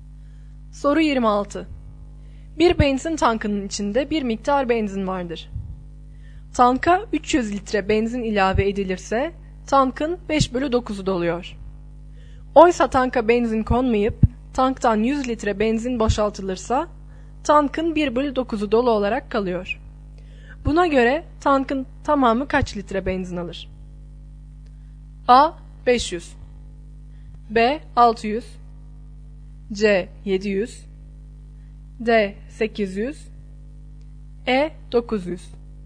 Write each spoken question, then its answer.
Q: Buna göre tankın tamamı kaç litre benzin alır?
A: Doğru yanıt E şıkkı.